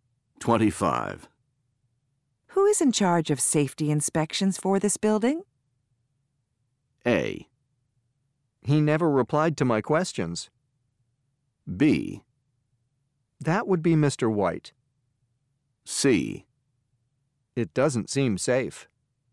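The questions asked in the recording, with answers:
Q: Who is in charge of safety inspections for this building?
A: B: That would be Mr. White.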